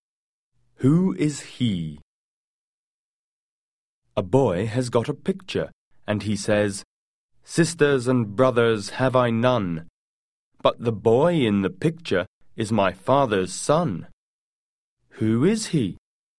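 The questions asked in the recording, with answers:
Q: Who is he?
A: the boy himself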